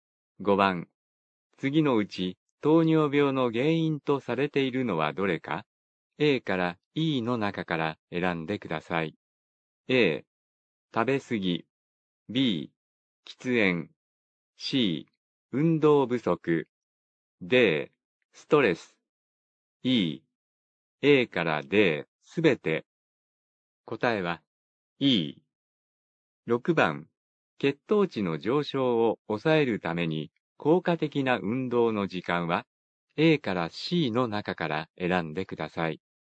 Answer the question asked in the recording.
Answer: 答えは E。